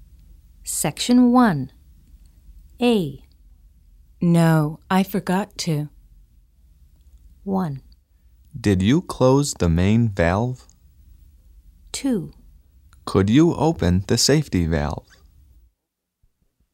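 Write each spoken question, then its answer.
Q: No, I forgot to.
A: 1: Did you close the main valve?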